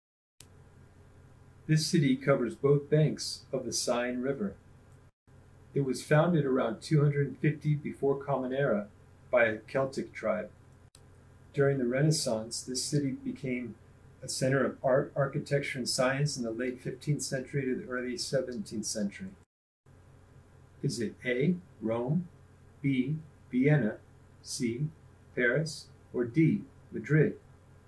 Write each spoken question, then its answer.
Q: Is it A, Rome, B, Vienna, C, Paris, or D, Madrid?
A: If you wrote Paris, you're correct.